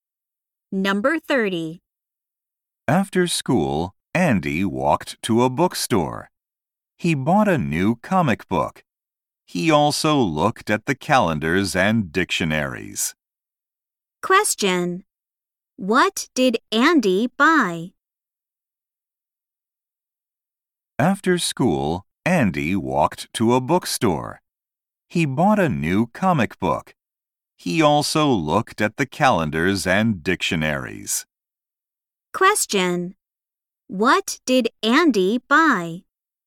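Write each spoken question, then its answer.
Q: What did Andy buy?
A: A new comic book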